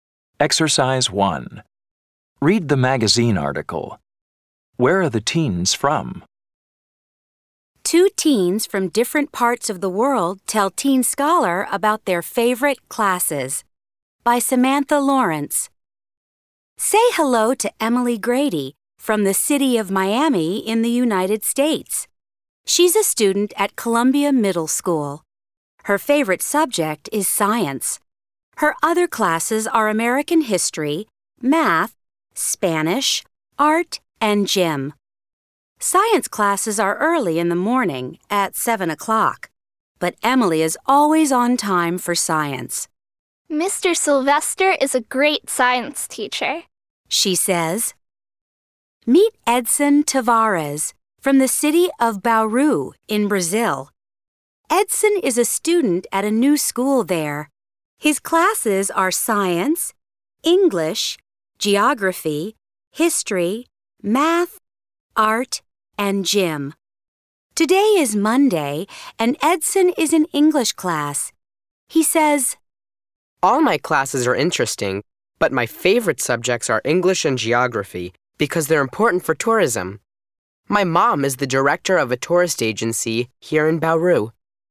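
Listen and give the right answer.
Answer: Emily is from Miami in the United States and Edson is from Bauru in Brazil.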